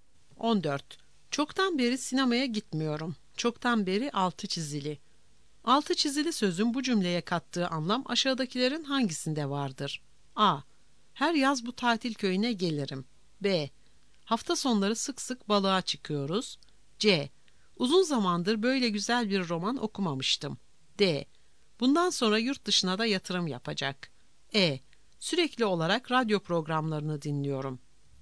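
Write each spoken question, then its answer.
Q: Altı çizili sözün bu cümleye kattığı anlam aşağıdakilerin hangisinde vardır?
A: C: Uzun zamandır böyle güzel bir roman okumamıştım.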